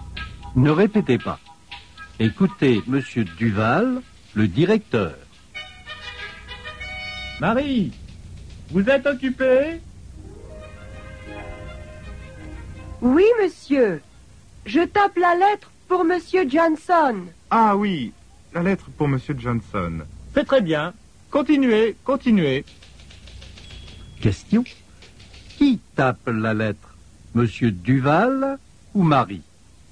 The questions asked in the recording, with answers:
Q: Qui tape la lettre?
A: Marie tape la lettre.